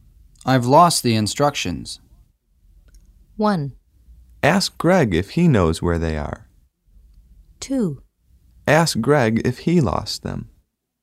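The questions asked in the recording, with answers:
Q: I've lost the instructions.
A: 1: Ask Greg if he knows where they are.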